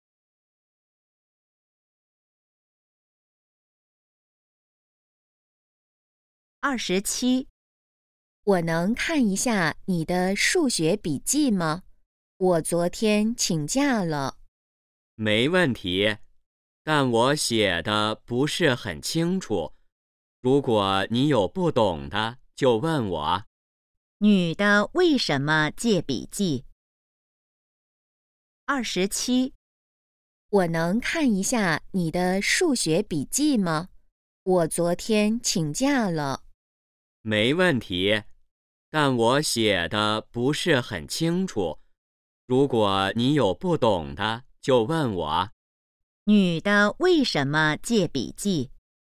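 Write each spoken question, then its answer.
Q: 女的为什么借笔记?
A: 她昨天请假了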